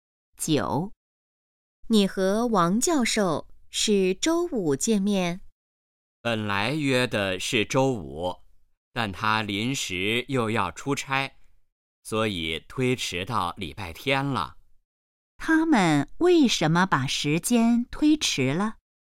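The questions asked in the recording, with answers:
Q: 他们为什么把时间推迟了?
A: 王教授临时要出差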